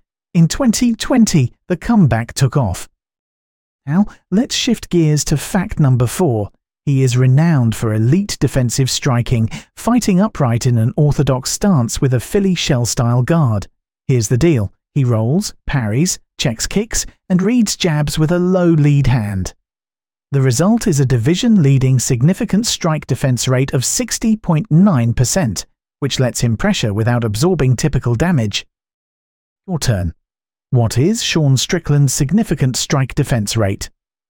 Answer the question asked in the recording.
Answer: Correct answer. 60.9%.